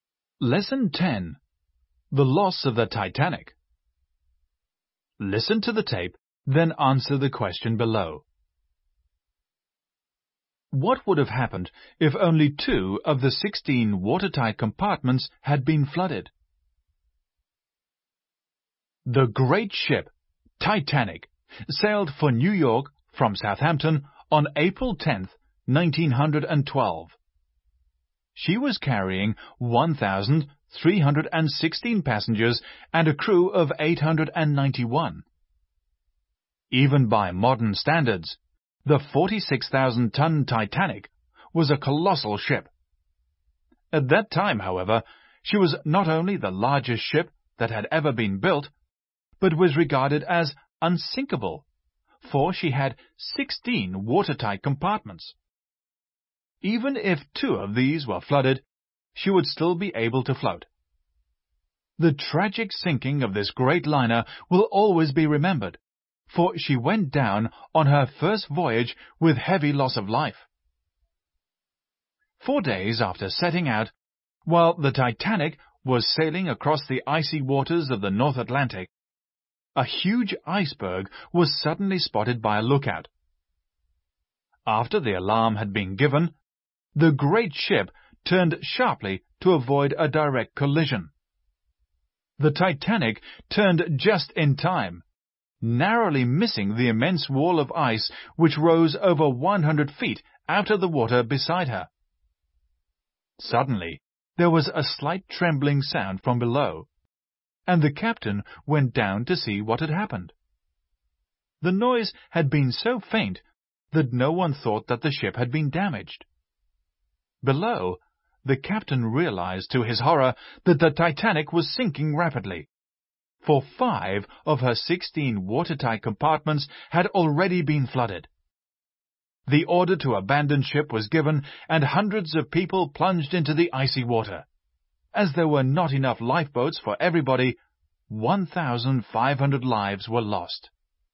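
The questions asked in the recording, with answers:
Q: What would have happened if only 2 of the 16 watertight compartments had been flooded?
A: She would still have been able to float.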